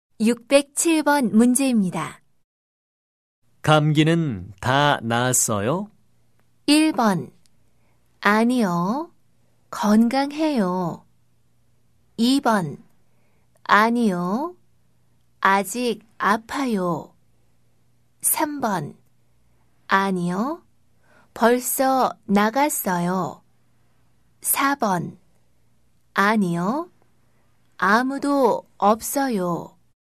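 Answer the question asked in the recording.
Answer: 2번: 아니요. 아직 아파요.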